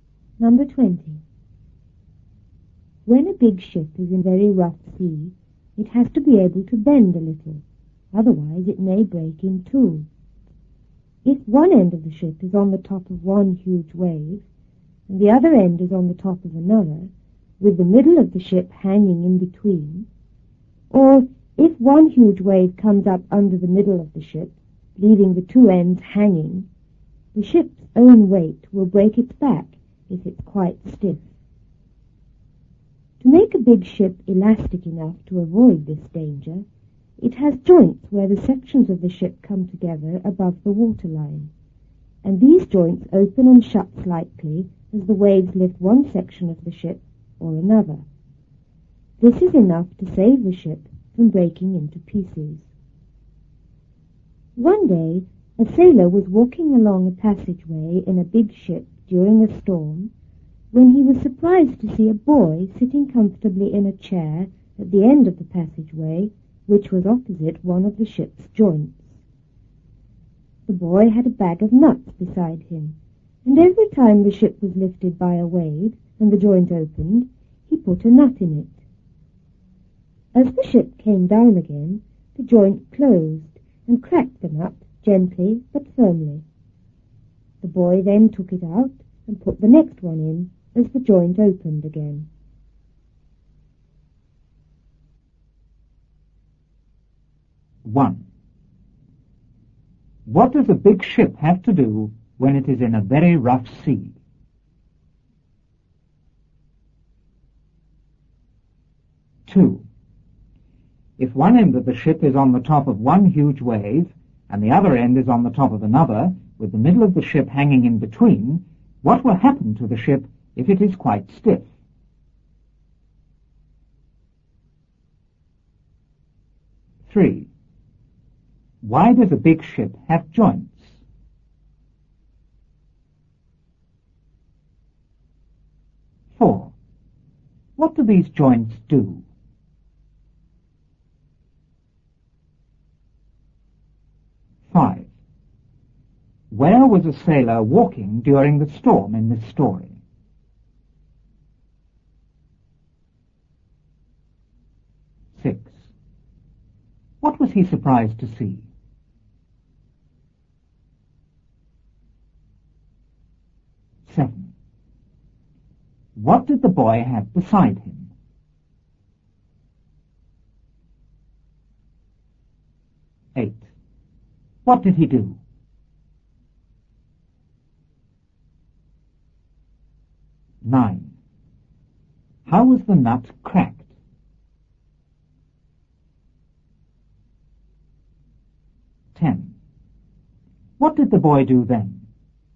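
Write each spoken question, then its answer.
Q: What does a big ship have to do when it is in a very rough sea?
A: It has to be able to bend a little.

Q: If one end of the ship is on the top of one huge wave, and the other end is on the top of another, with the middle of the ship hanging in between, what will happen to the ship if it is quite stiff?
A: Its own weight will break its back.

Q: Why does a big ship have joints?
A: To make it elastic enough so it doesn't break.

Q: What do these joints do?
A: They open and shut slightly as the waves lift the ship.

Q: Where was a sailor walking during the storm in this story?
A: Along a passageway in a big ship.

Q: What was he surprised to see?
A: A boy sitting comfortably in a chair at the end of the passageway.

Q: What did the boy have beside him?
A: A bag of nuts.

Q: What did he do?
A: He put a nut in the joint every time it opened.

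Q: How was the nut cracked?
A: The joint closed on it as the ship came down.

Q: What did the boy do then?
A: He took the nut out and put the next one in.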